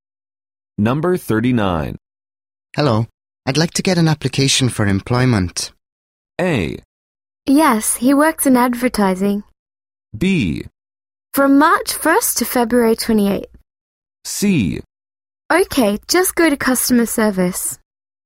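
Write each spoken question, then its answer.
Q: Hello, I'd like to get an application for employment.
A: C: Okay, just go to customer service.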